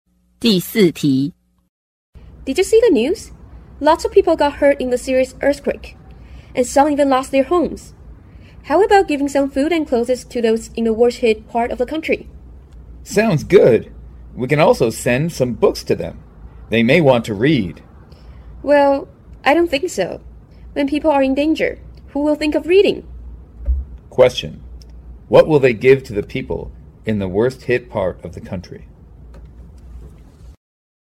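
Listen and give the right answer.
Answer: Food and clothes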